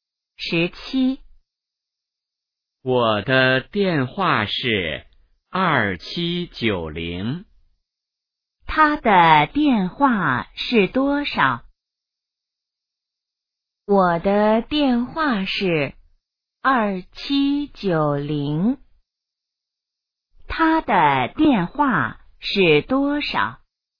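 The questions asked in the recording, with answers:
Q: 他的电话是多少?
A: 2790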